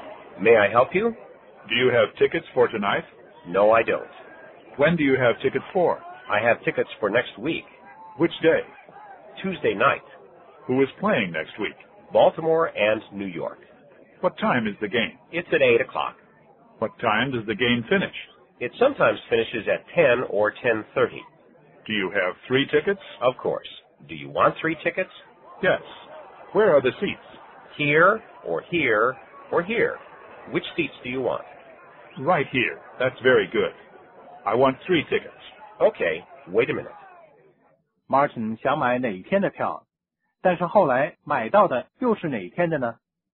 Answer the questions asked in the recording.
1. Martin 原来是想买今天晚上的票。
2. 下星期二晚上。